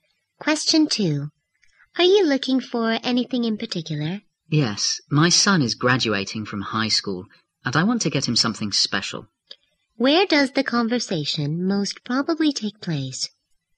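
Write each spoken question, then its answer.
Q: Where does the conversation most probably take place?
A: In a store.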